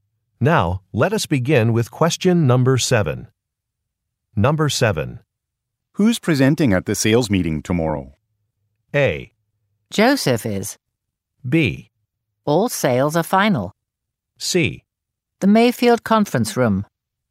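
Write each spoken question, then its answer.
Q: Who's presenting at the sales meeting tomorrow?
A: A: Joseph is.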